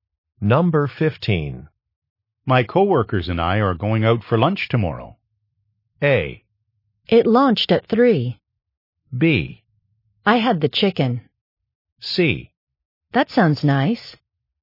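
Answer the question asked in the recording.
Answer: C: That sounds nice.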